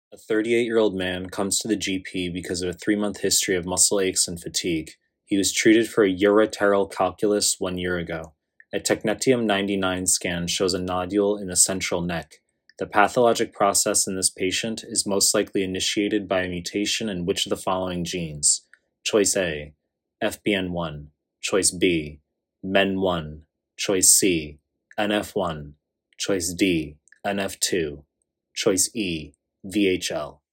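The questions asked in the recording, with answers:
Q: The pathologic process in this patient is most likely initiated by a mutation in which of the following genes?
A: B: MEN1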